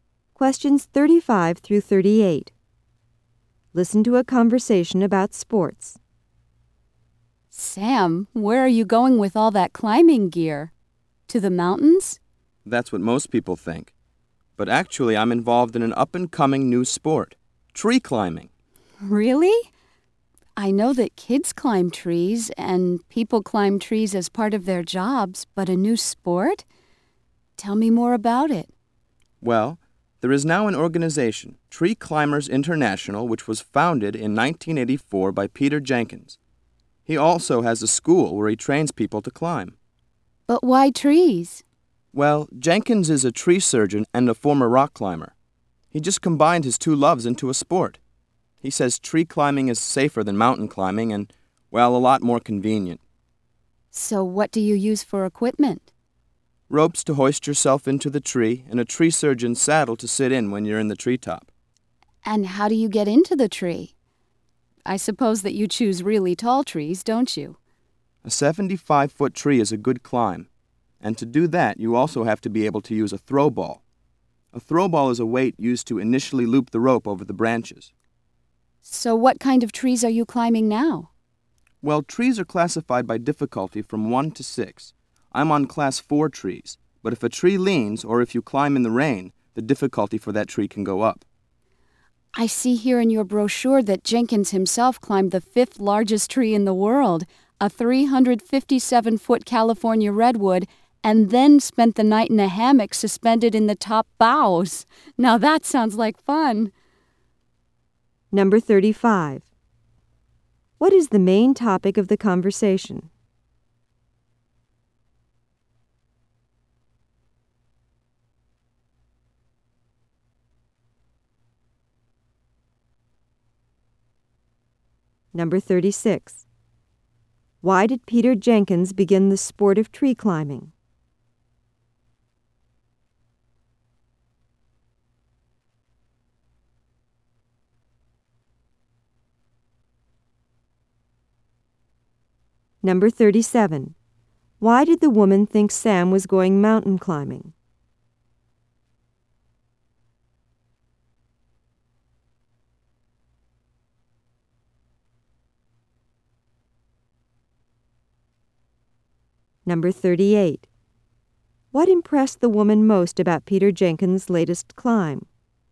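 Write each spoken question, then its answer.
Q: What is the main topic of the conversation?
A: Tree climbing as a new sport

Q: Why did Peter Jenkins begin the sport of tree climbing?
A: To combine his two loves, tree surgery and rock climbing

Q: Why did the woman think Sam was going mountain climbing?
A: Because he was carrying climbing gear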